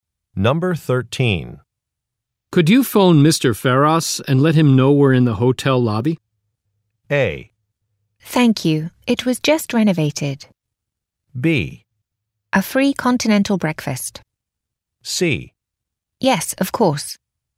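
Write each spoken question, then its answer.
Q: Could you phone Mr. Ferros and let him know we're in the hotel lobby?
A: C: Yes, of course.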